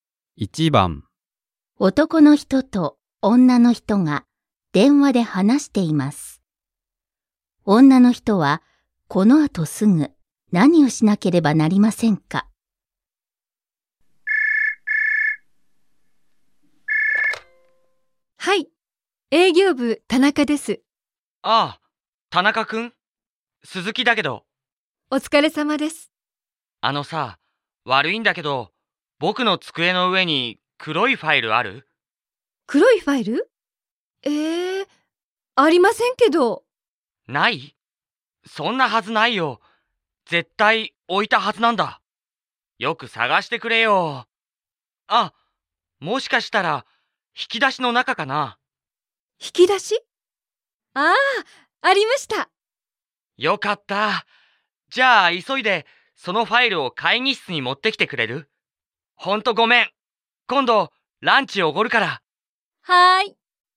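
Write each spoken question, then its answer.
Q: 女の人はこの後すぐ何をしなければなりませんか。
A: 黒いファイルを会議室に持っていく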